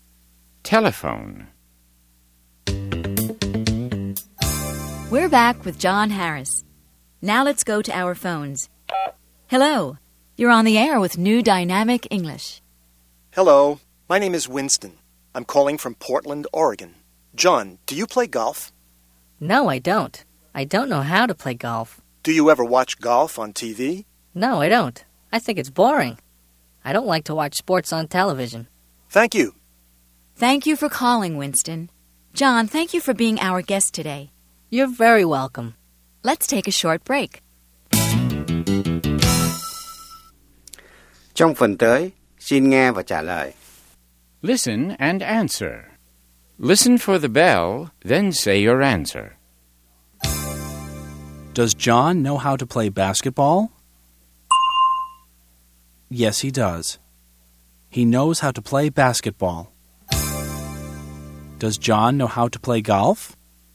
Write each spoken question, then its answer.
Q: Does John know how to play golf?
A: No, he doesn't. He doesn't know how to play golf.